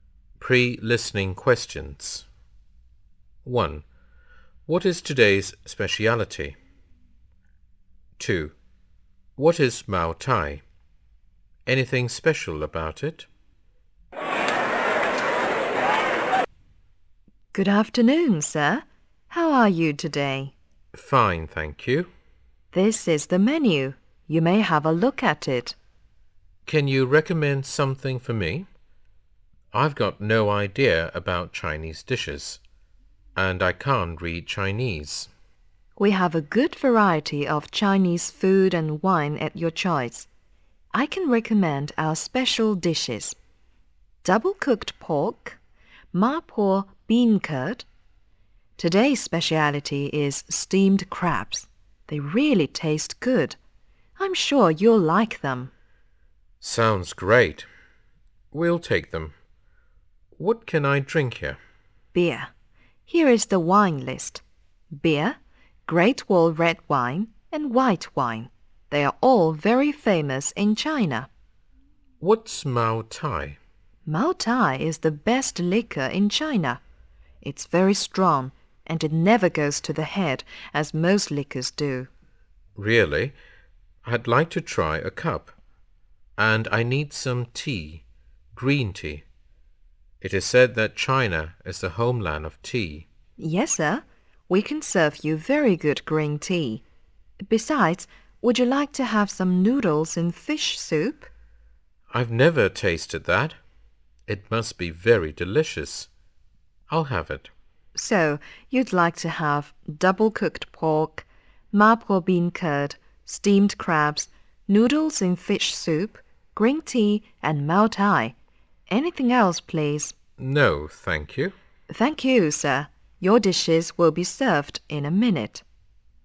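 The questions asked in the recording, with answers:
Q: What is today's speciality?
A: Steamed crabs

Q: What is Mao Tai? Anything special about it?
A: The best liquor in China; it's very strong but never goes to the head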